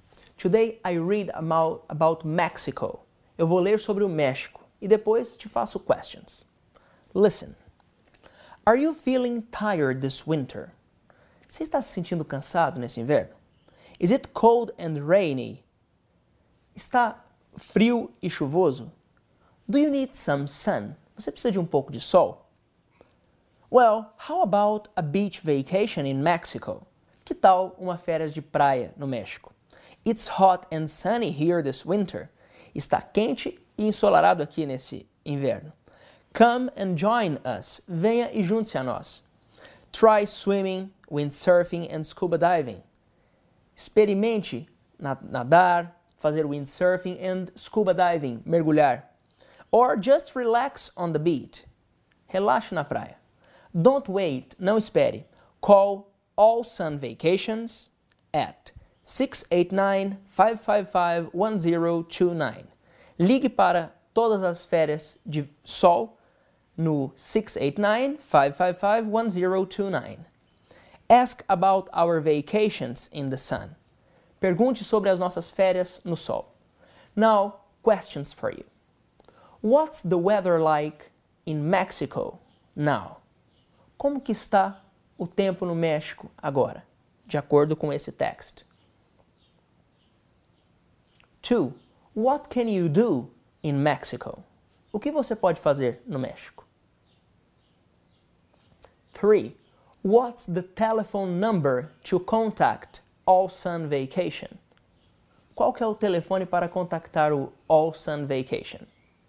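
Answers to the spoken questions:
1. It's hot and sunny
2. Swim, windsurf, scuba dive, or relax on the beach
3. 689-555-1029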